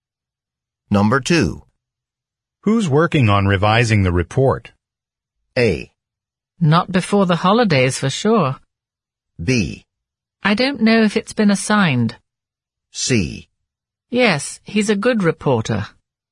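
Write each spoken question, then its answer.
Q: Who's working on revising the report?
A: B: I don't know if it's been assigned.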